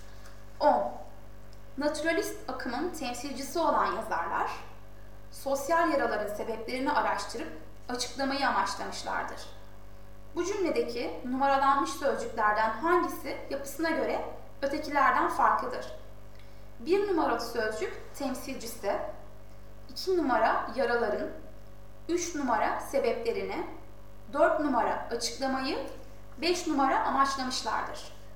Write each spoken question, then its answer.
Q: Bu cümledeki numaralanmış sözcüklerden hangisi yapısına göre ötekilerden farklıdır?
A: Doğru yanıt C.